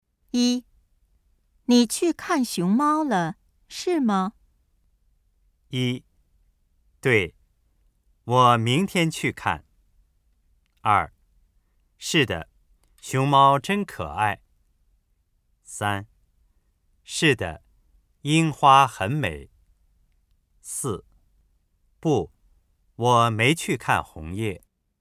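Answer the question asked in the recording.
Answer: 二: 是的,熊猫真可爱。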